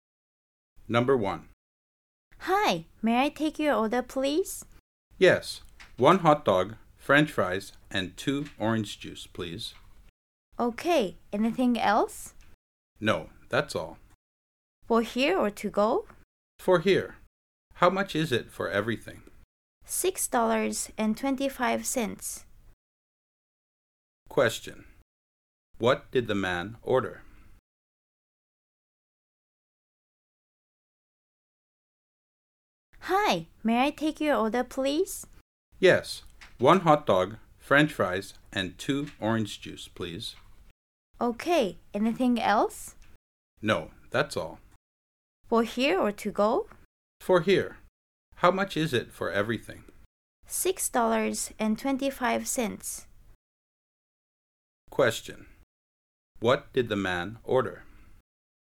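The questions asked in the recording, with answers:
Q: What did the man order?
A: One hot dog, french fries, and two orange juices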